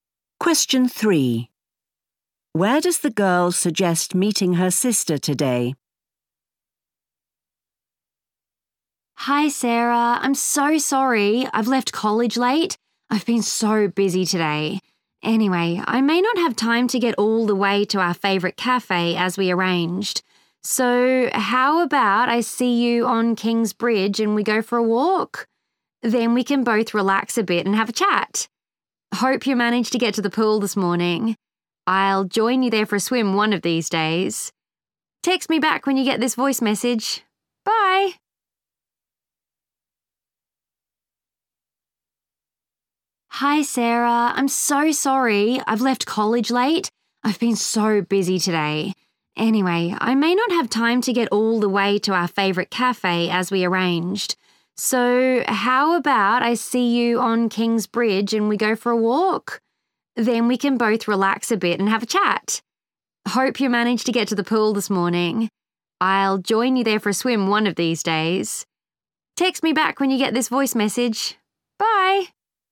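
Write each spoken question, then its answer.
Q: Where does the girl suggest meeting her sister today?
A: on King's Bridge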